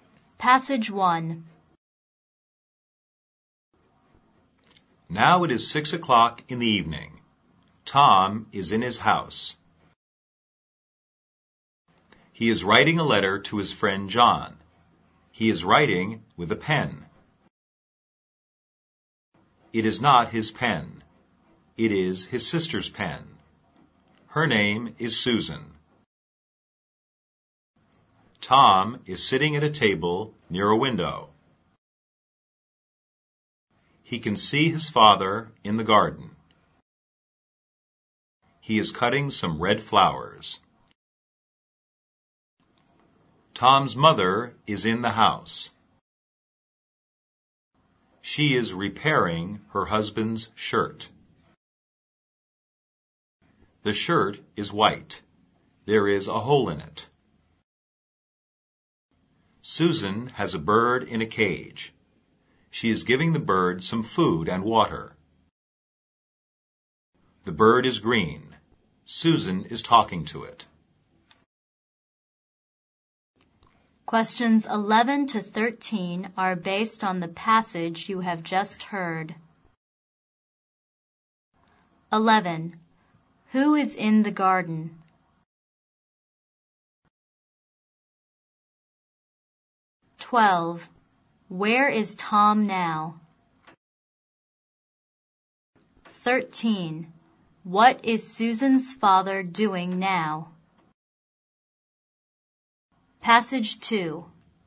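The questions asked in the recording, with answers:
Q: Who is in the garden?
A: Tom's father

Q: Where is Tom now?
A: In his house, at a table near a window

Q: What is Susan's father doing now?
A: Cutting some red flowers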